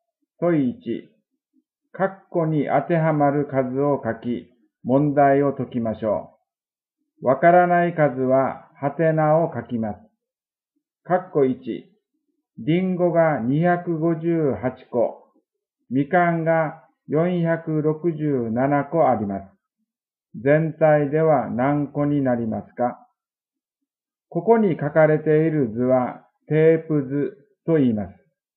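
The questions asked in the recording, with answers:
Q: カッコ1、リンゴが258個、みかんが467個あります。 全体では何個になりますか?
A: 725個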